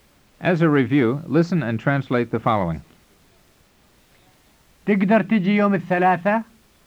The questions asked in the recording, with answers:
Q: As a review, listen and translate the following.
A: It means, can you come over on Tuesday?